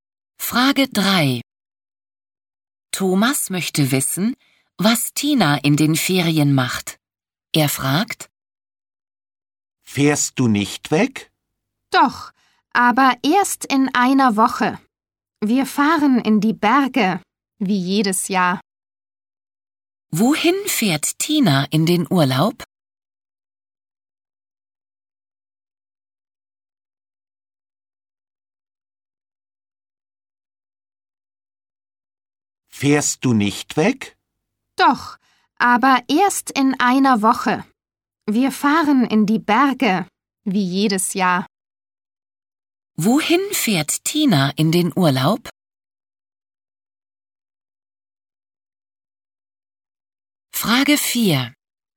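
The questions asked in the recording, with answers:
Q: Wohin fährt Tina in den Urlaub?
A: In die Berge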